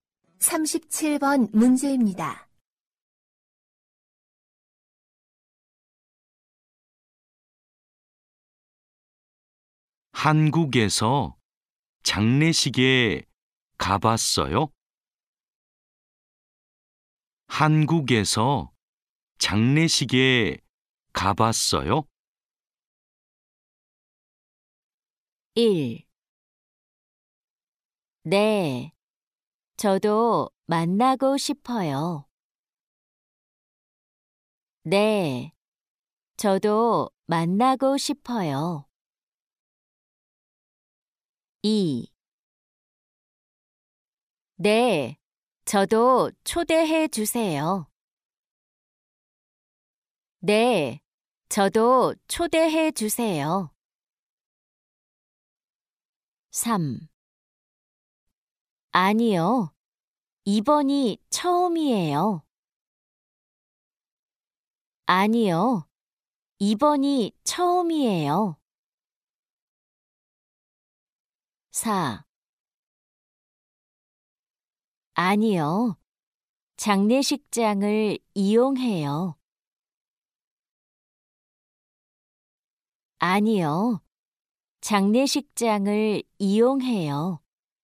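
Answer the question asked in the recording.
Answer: 3: 아니요, 이번이 처음이에요.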